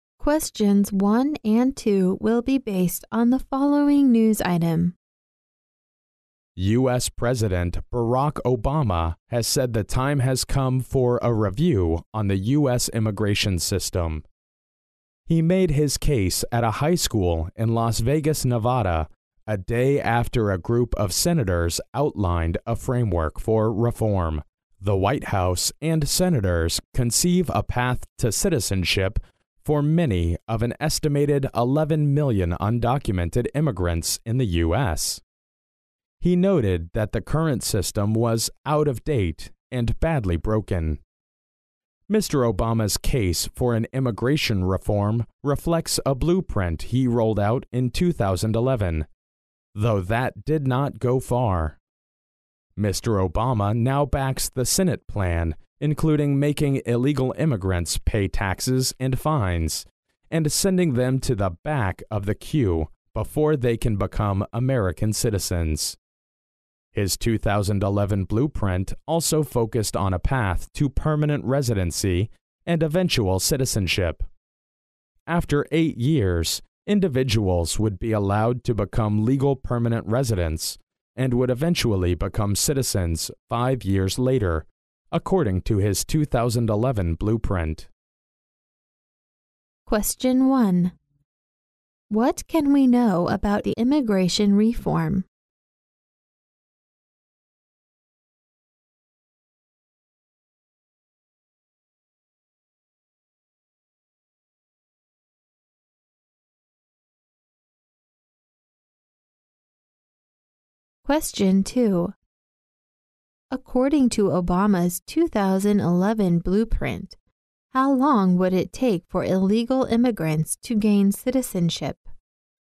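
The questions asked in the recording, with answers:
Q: According to Obama's 2011 blueprint, how long would it take for illegal immigrants to gain citizenship?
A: 13 years (8 years to permanent residency, then 5 more years)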